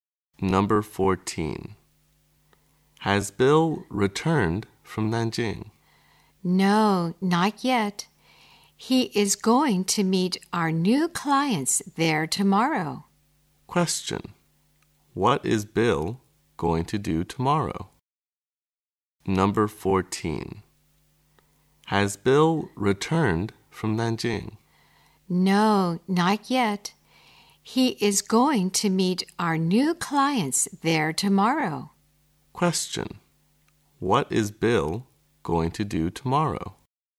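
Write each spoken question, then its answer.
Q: What is Bill going to do tomorrow?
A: Meet new clients in Nanjing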